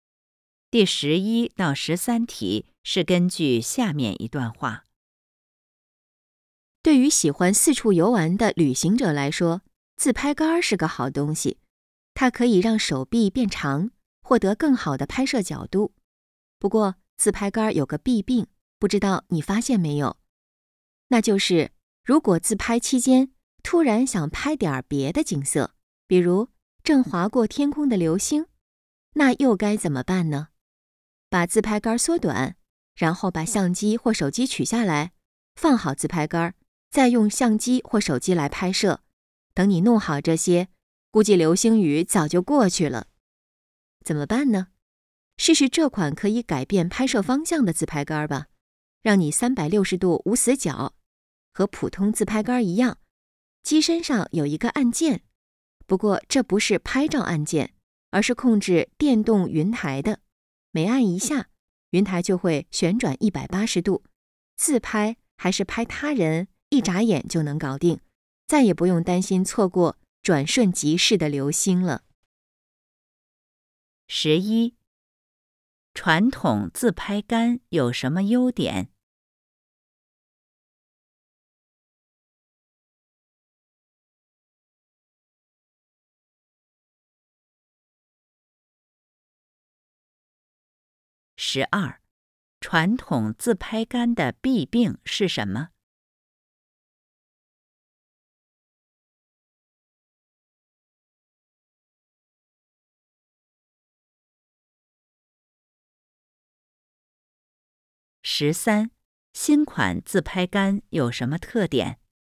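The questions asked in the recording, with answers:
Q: 传统自拍杆有什么优点?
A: 可以让手臂变长,获得更好的拍摄角度

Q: 传统自拍杆的弊病是什么?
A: 自拍时想拍别的景色很麻烦,需要取下相机或手机,容易错过

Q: 新款自拍杆有什么特点?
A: 可以改变拍摄方向,按键控制云台旋转180度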